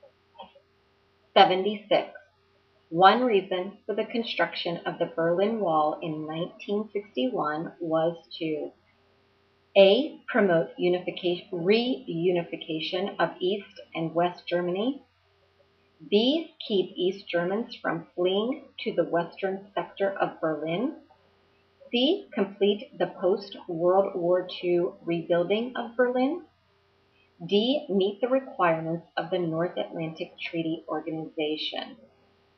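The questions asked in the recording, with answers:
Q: One reason for the construction of the Berlin Wall in 1961 was to A, promote reunification of East and West Germany, B, keep East Germans from fleeing to the western sector of Berlin, C, complete the post-World War II rebuilding of Berlin, D, meet the requirements of the North Atlantic Treaty Organization.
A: B: keep East Germans from fleeing to the western sector of Berlin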